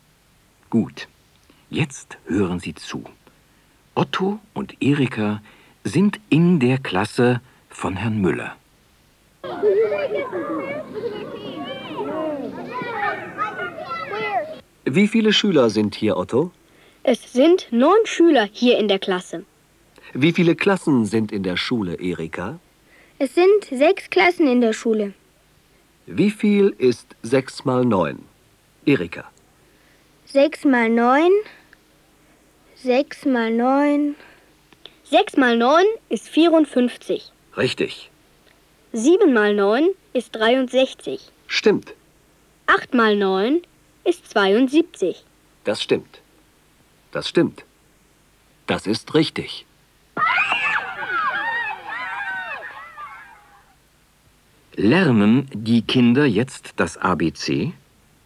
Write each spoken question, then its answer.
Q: Lernen die Kinder jetzt das ABC?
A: Nein, sie lernen jetzt nicht das ABC.